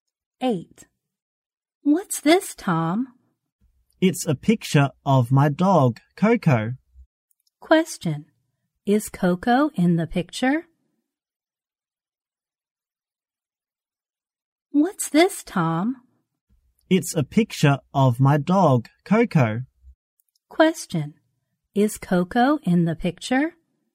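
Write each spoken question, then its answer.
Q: Is Coco in the picture?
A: Yes, it is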